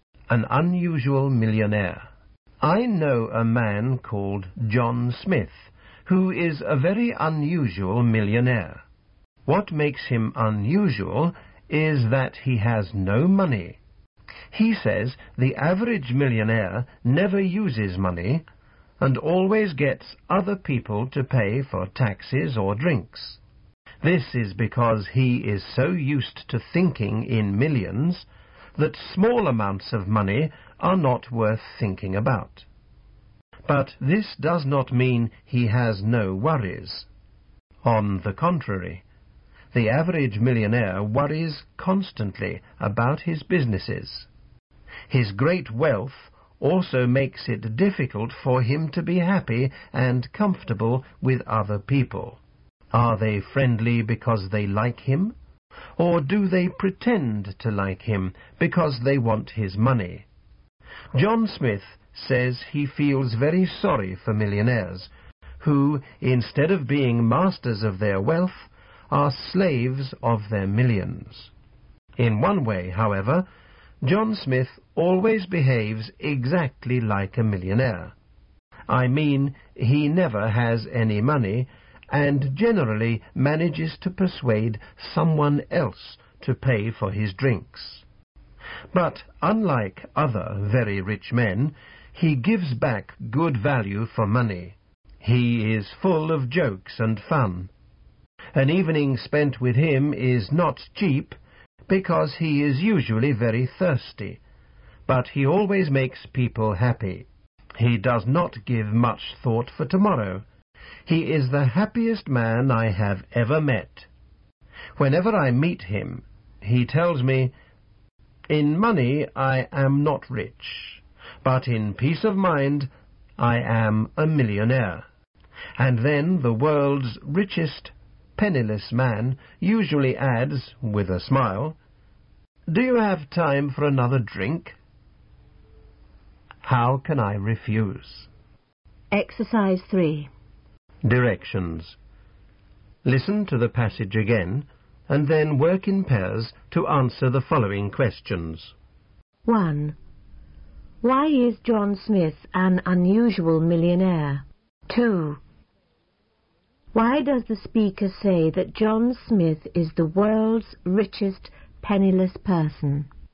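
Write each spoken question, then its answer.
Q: Why is John Smith an unusual millionaire?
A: Because he has no money

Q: Why does the speaker say that John Smith is the world's richest penniless person?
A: He has no money but is rich in peace of mind and is very happy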